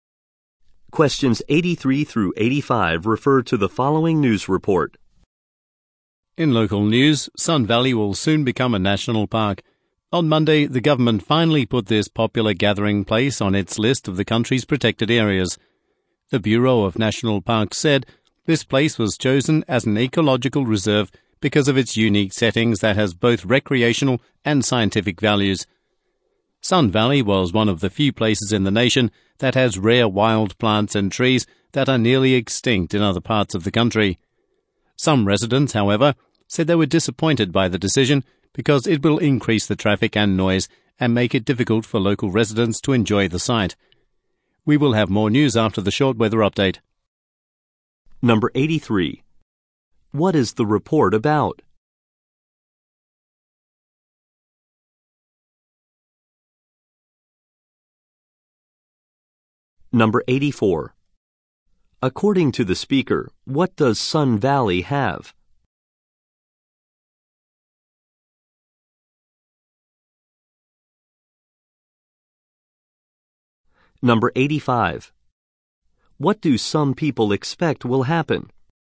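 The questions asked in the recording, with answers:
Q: What is the report about?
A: Sun Valley becoming a national park

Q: According to the speaker, what does Sun Valley have?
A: Rare wild plants and trees

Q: What do some people expect will happen?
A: More traffic and noise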